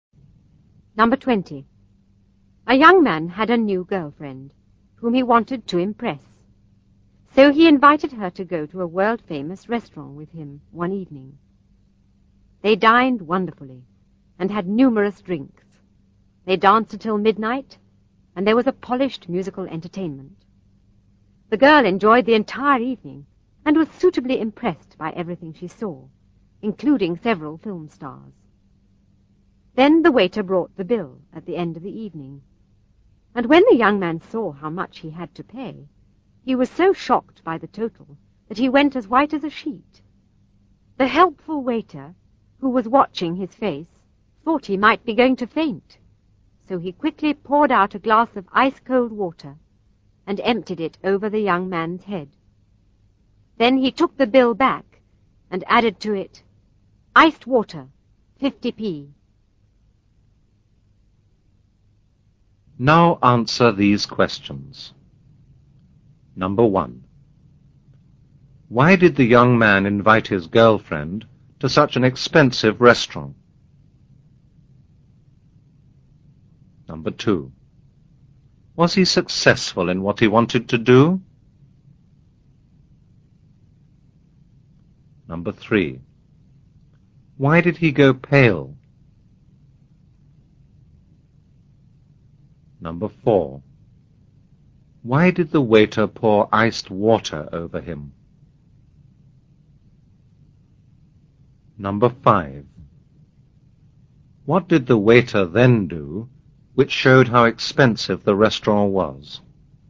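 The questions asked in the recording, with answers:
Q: Why did the young man invite his girlfriend to such an expensive restaurant?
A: He wanted to impress her.

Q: Was he successful in what he wanted to do?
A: Yes, she was suitably impressed.

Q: Why did he go pale?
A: He was shocked by how much the bill was.

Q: Why did the waiter pour iced water over him?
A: He thought the young man might faint.

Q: What did the waiter then do, which showed how expensive the restaurant was?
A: He added 50p for the iced water to the bill.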